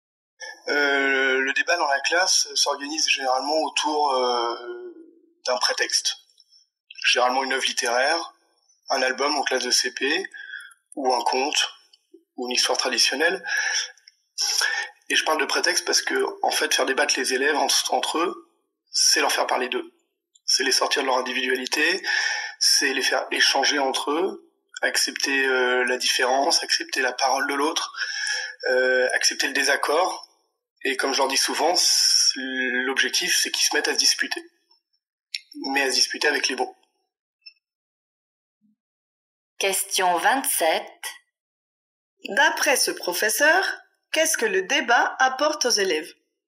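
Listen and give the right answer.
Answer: Il les fait sortir de leur individualité et échanger entre eux : accepter la différence, la parole de l'autre et le désaccord.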